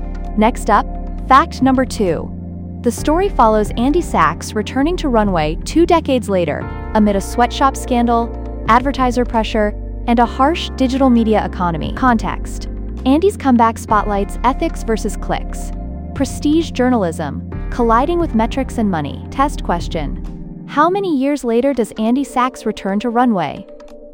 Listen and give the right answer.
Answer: 2 decades.